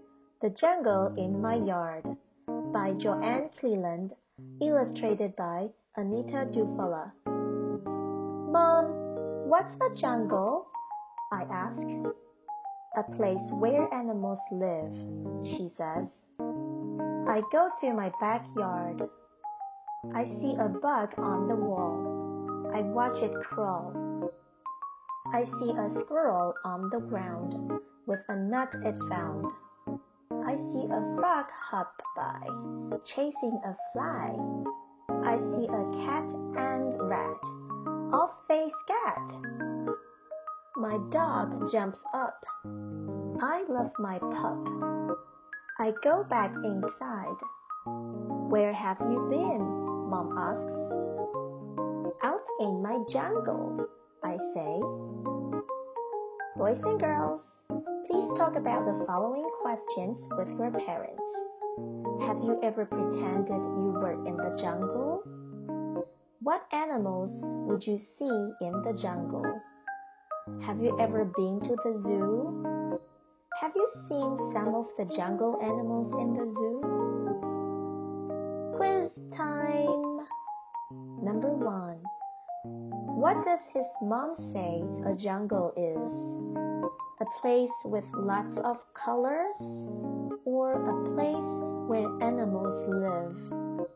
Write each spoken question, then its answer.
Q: What does his mom say a jungle is?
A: That's right, a place where animals live.